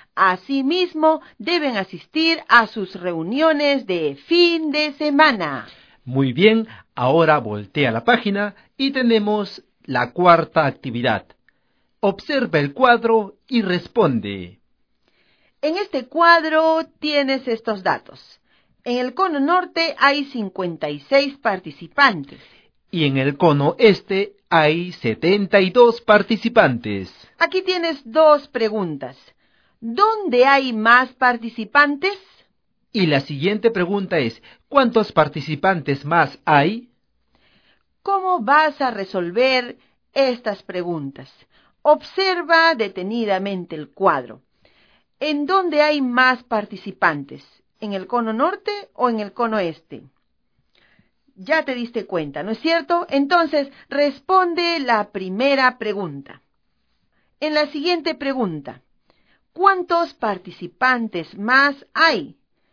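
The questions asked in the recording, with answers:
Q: ¿Dónde hay más participantes?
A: En el cono este

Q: ¿cuántos participantes más hay?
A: 16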